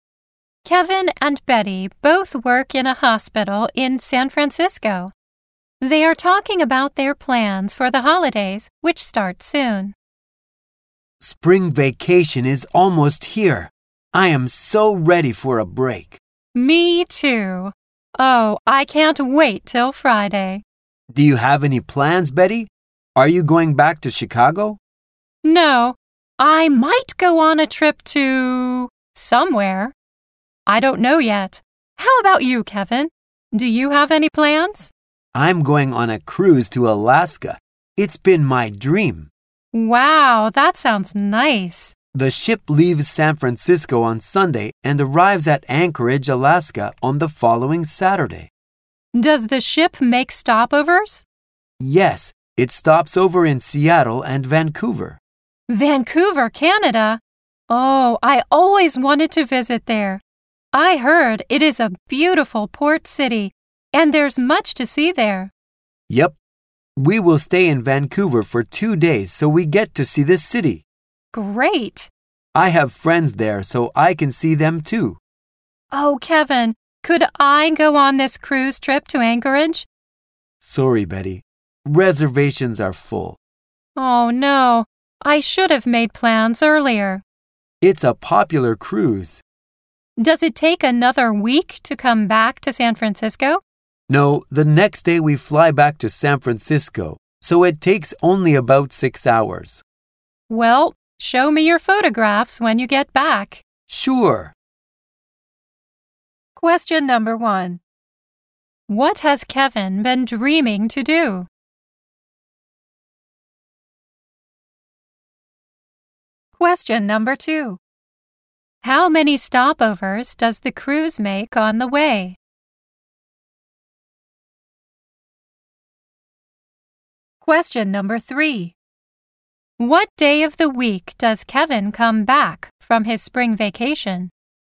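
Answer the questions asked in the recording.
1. To go on a cruise to Alaska
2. Two (Seattle and Vancouver)
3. Sunday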